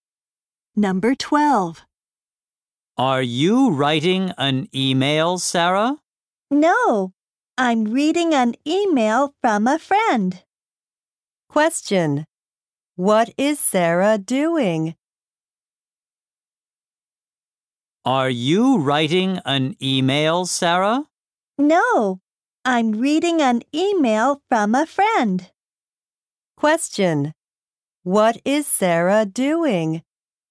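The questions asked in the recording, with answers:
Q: What is Sarah doing?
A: Reading an email from a friend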